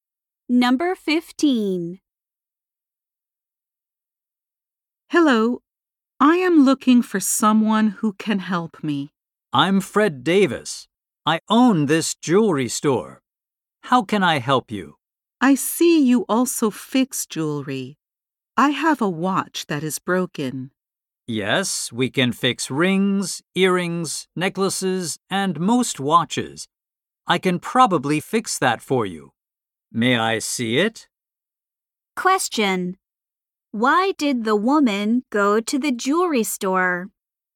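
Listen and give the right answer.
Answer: To get her broken watch fixed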